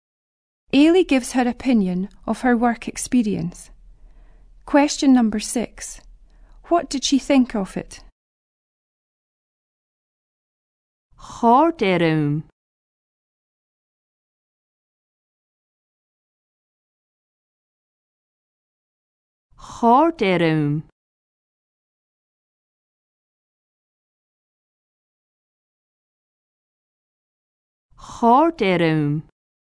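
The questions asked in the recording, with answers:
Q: What did she think of it?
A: She enjoyed it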